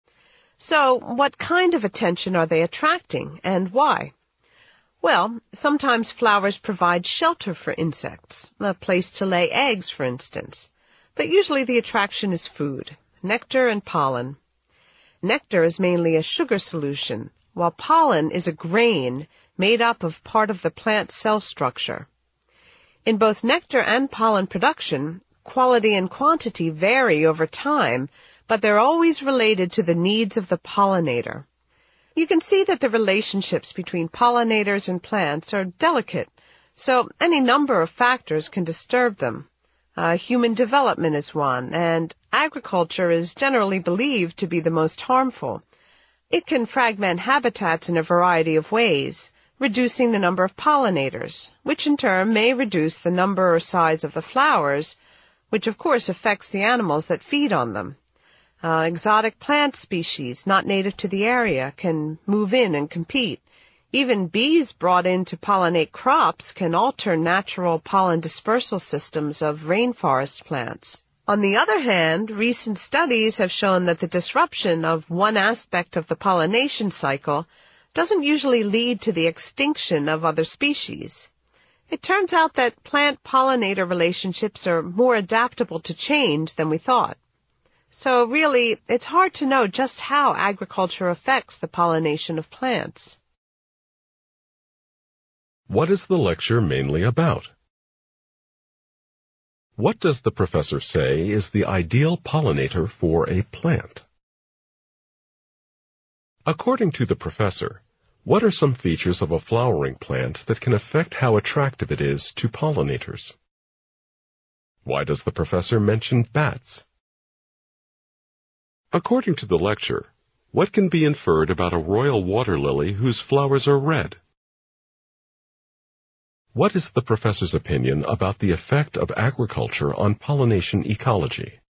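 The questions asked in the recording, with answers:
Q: What is the professor's opinion about the effect of agriculture on pollination ecology?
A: It is hard to know how agriculture affects pollination; the effects are uncertain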